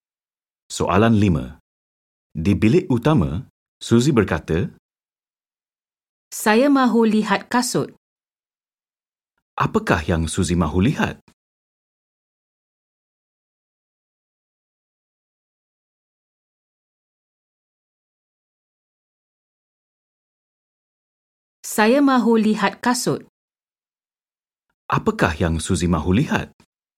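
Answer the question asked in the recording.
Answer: Kasut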